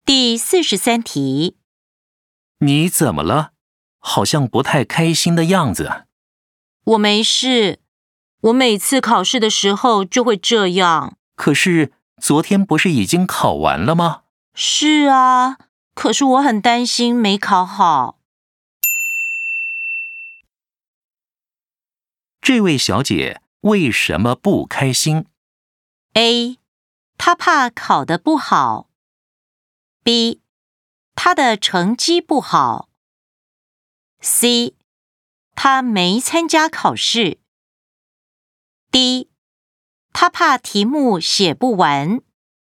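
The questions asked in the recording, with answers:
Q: 这位小姐为什么不开心?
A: A: 她怕考得不好。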